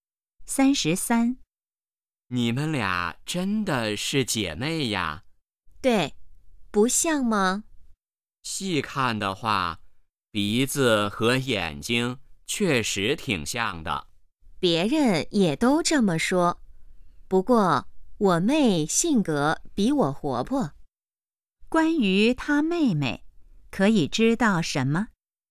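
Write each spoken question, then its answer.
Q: 关于她妹妹,可以知道什么?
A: 性格比姐姐活泼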